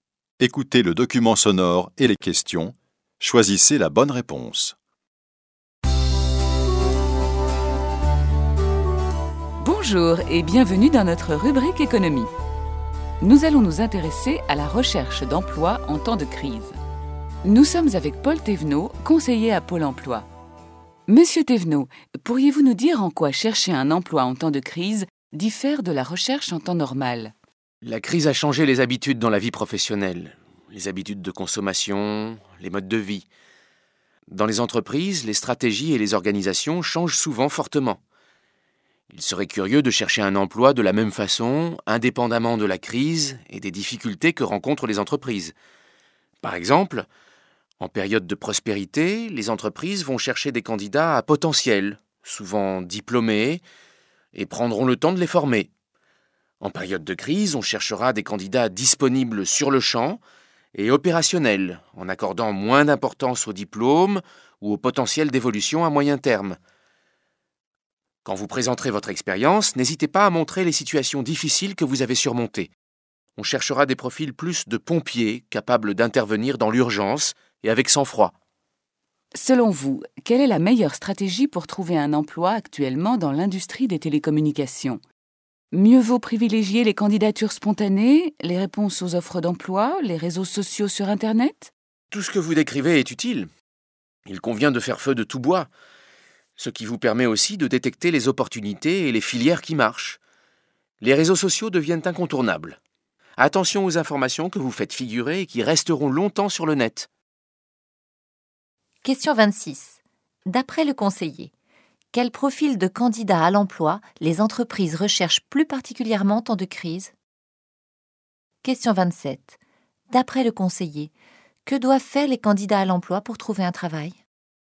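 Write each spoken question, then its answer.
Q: D'après le conseiller, quel profil de candidat à l'emploi les entreprises recherchent plus particulièrement en temps de crise?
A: Des candidats disponibles tout de suite et opérationnels, capables d'intervenir dans l'urgence avec sang-froid

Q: D'après le conseiller, que doivent faire les candidats à l'emploi pour trouver un travail?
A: Utiliser tous les moyens : candidatures spontanées, réponses aux offres, réseaux sociaux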